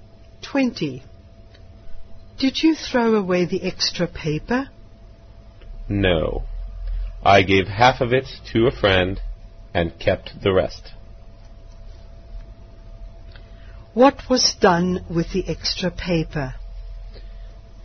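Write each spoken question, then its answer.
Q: What was done with the extra paper?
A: Half was given to a friend and the rest kept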